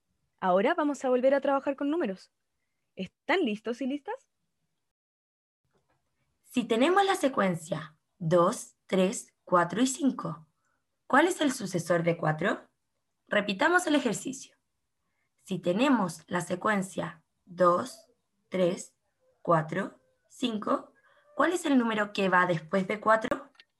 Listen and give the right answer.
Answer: el sucesor de 4 sería el número 5